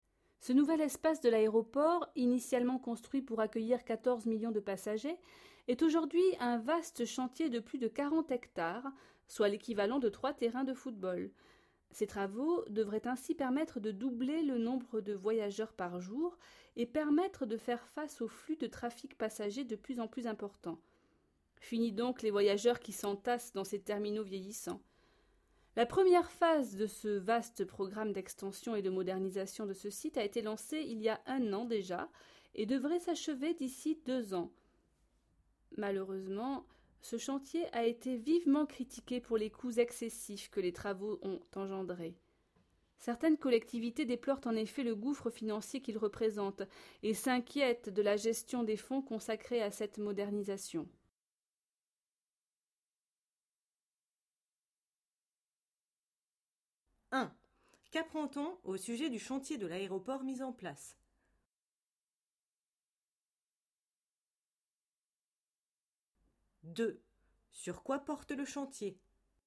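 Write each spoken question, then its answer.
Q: Sur quoi porte le chantier ?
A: L'extension et la modernisation de l'aéroport.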